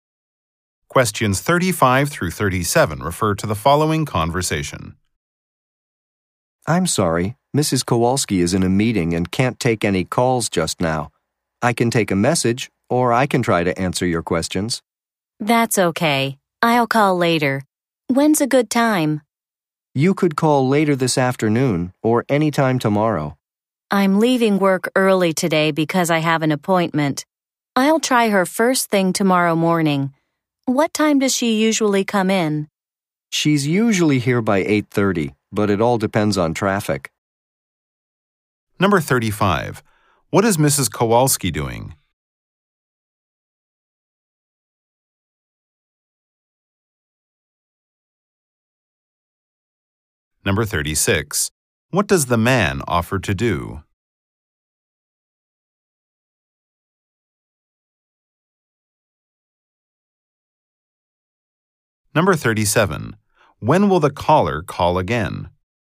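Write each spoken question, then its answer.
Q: What is Mrs. Kowalski doing?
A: She is in a meeting

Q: What does the man offer to do?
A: Take a message or answer questions

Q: When will the caller call again?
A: Tomorrow morning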